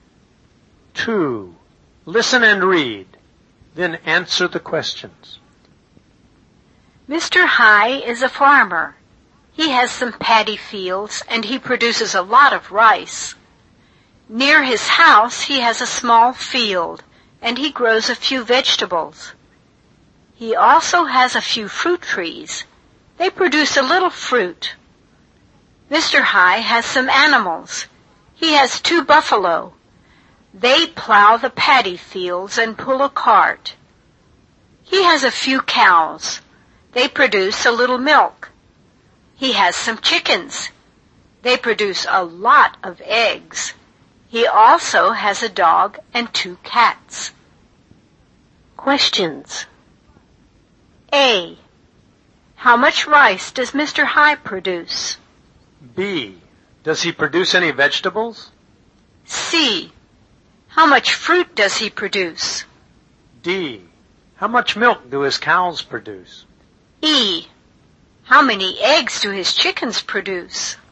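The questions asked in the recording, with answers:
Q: How much rice does Mr. High produce?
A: A lot of rice

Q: Does he produce any vegetables?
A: Yes, a few vegetables

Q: How much fruit does he produce?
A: A little fruit

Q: How much milk do his cows produce?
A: A little milk

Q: How many eggs do his chickens produce?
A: A lot of eggs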